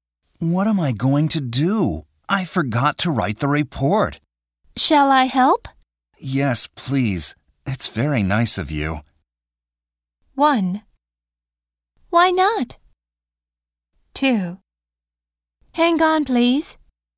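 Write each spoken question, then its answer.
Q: Yes, please. It's very nice of you.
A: 3: My pleasure.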